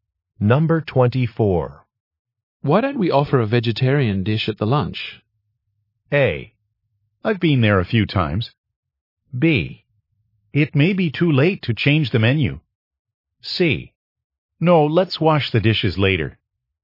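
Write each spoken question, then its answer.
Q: Why don't we offer a vegetarian dish at the lunch?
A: B: It may be too late to change the menu.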